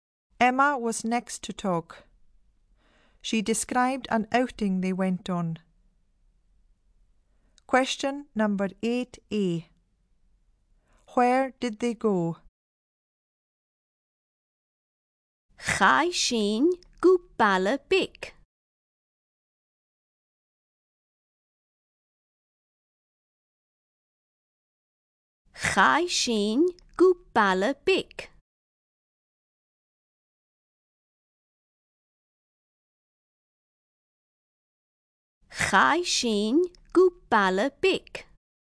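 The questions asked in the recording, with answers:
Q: Where did they go?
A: To a small town/village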